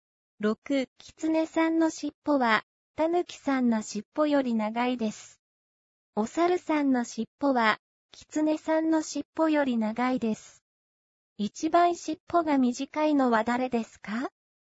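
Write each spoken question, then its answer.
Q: 一番尻尾が短いのは誰ですか?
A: タヌキさん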